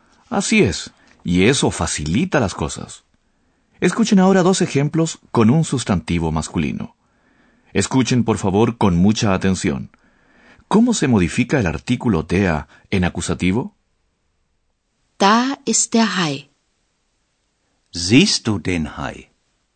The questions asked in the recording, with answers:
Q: ¿Cómo se modifica el artículo TEA en acusativo?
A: En acusativo, el artículo determinado se modifica en den